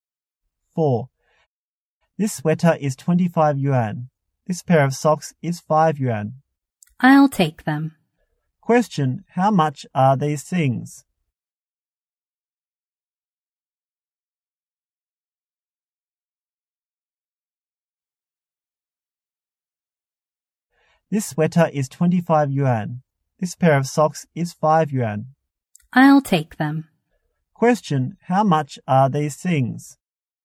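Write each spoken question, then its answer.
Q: how much are these things?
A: 30 yuan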